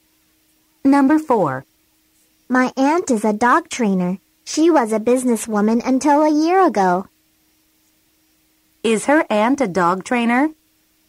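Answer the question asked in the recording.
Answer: Yes, she is.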